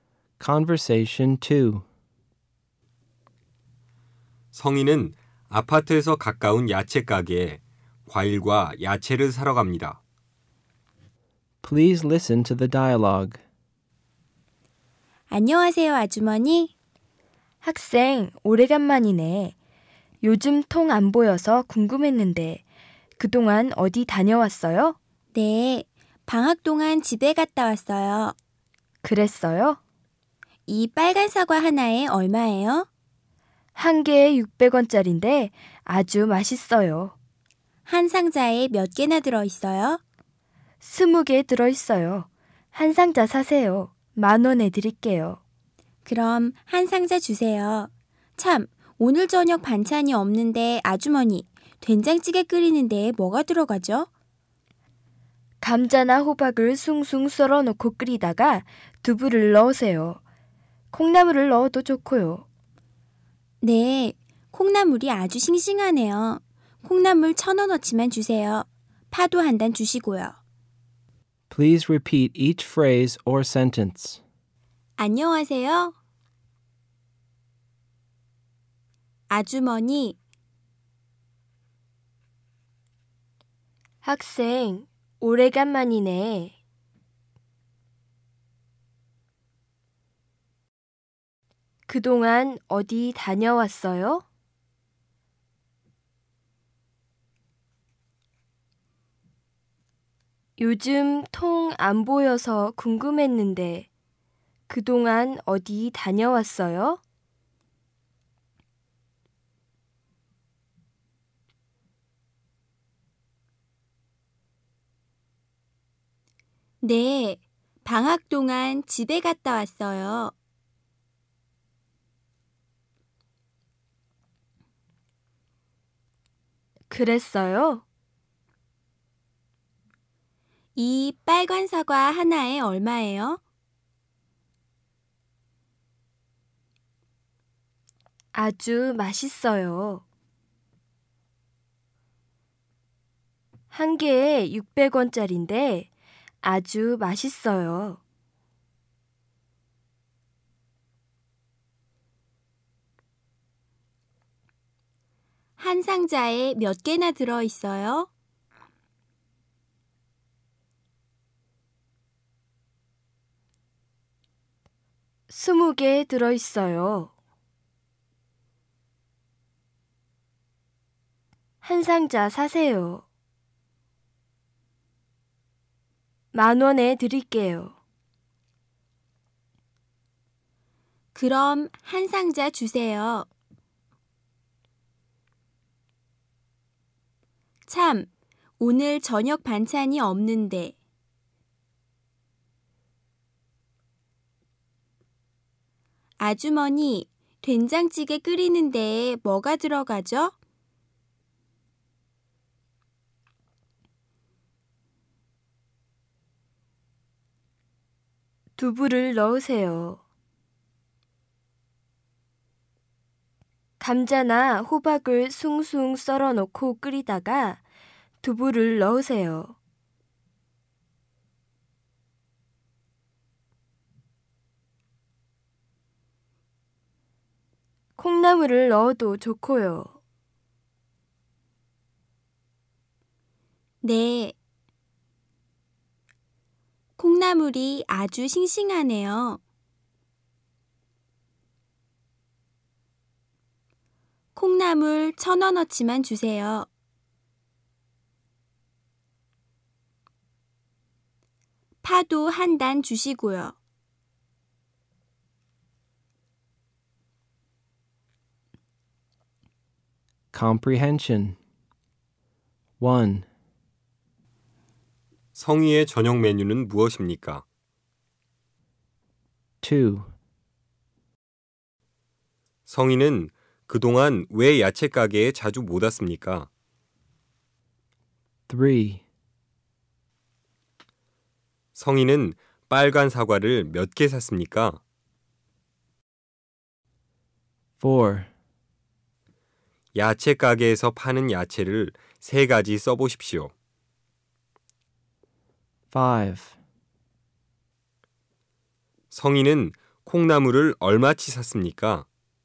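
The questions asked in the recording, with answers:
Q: 성희의 저녁 메뉴는 무엇입니까?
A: 된장찌개

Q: 성희는 그동안 왜 야채 가게에 자주 못 왔습니까?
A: 방학 동안 집에 갔다 와서

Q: 성희는 빨간 사과를 몇 개 샀습니까?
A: 20개 (한 상자)

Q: 성희는 콩나물을 얼마치 샀습니까?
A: 1,000원어치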